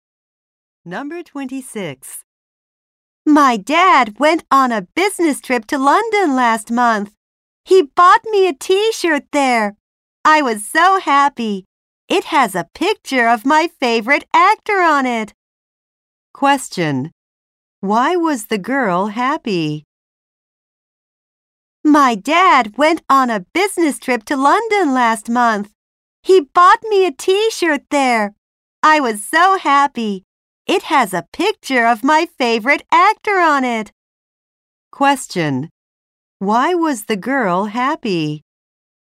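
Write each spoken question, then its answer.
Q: Why was the girl happy?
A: Her dad bought her a T-shirt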